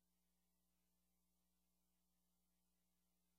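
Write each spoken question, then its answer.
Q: What does the woman mean?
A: They need to find a different parking place.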